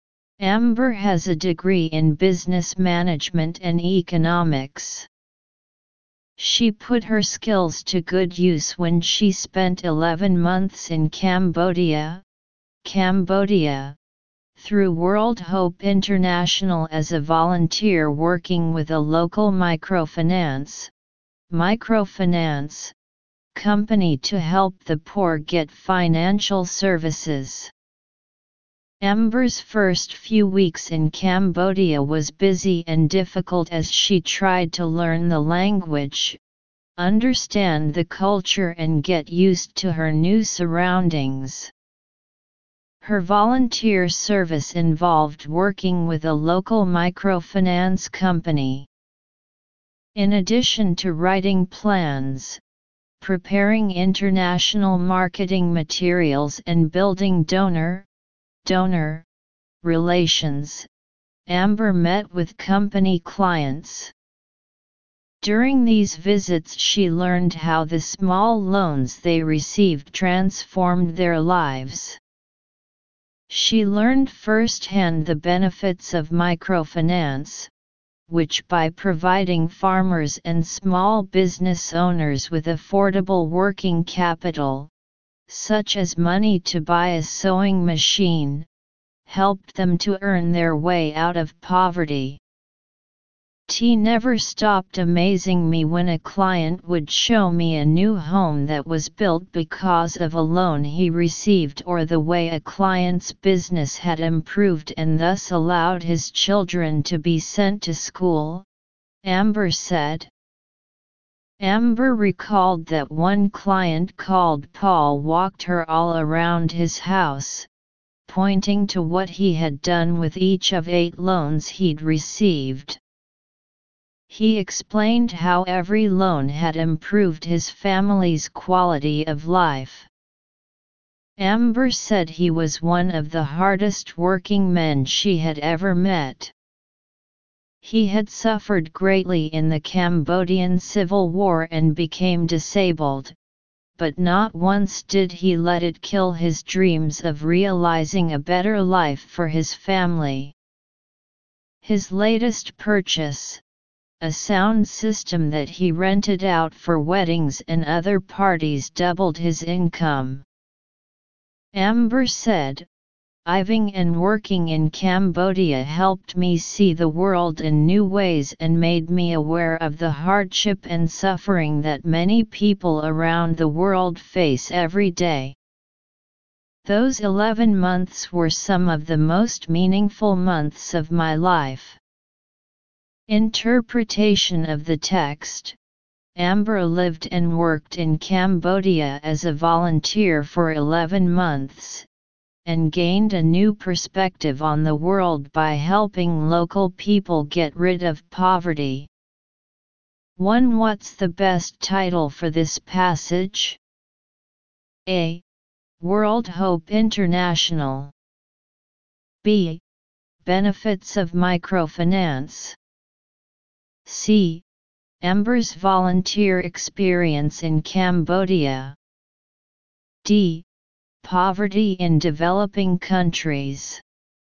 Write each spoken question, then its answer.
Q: What's the best title for this passage?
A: Analysis: choose C.